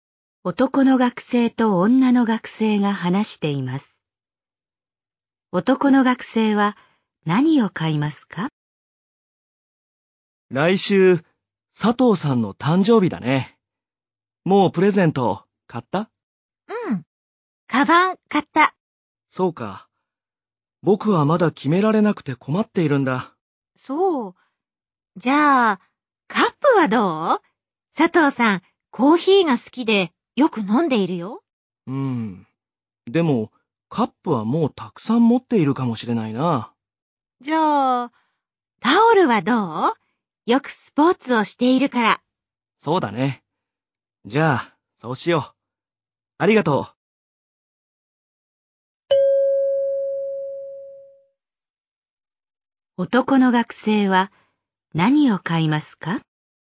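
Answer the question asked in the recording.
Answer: タオル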